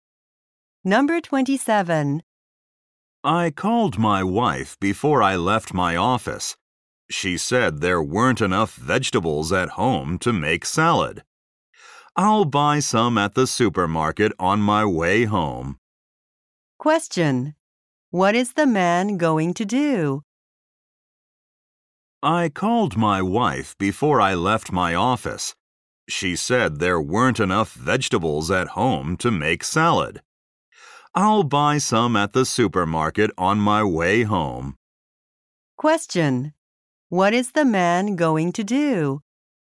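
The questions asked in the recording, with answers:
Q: What is the man going to do?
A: Buy vegetables at the supermarket.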